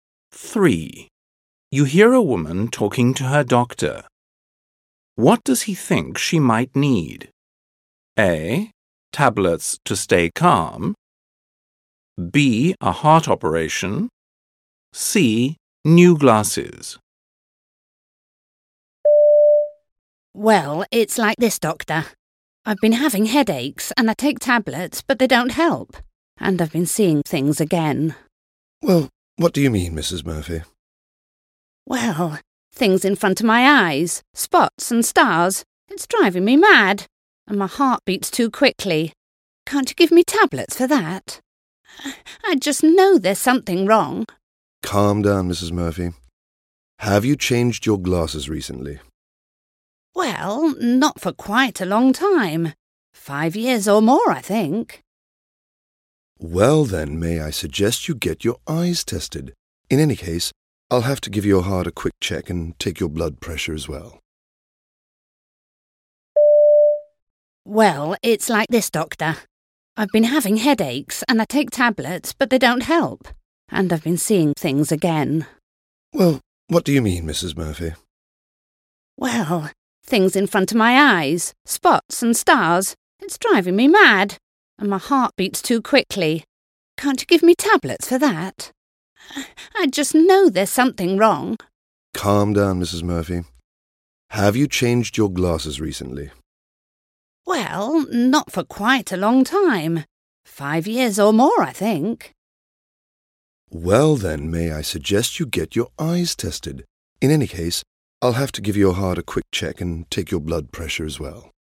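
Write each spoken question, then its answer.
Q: What does he think she might need?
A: C: New glasses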